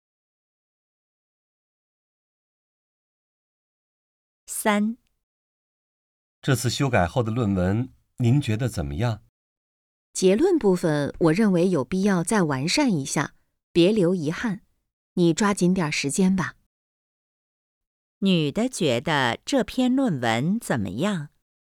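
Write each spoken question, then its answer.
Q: 女的觉得这篇论文怎么样?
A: 结论部分还需要完善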